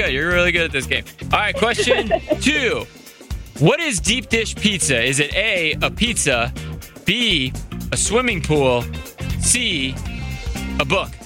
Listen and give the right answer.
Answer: I think I'm going to go with A again.